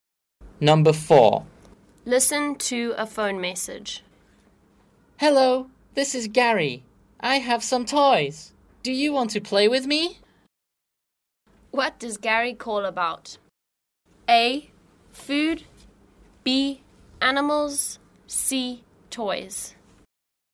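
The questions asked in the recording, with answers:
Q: What does Gary call about?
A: C: Toys.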